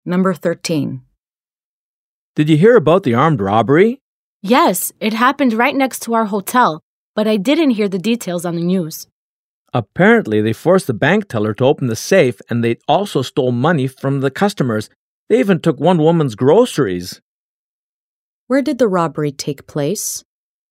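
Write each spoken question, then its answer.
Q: Where did the robbery take place?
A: At a bank next to their hotel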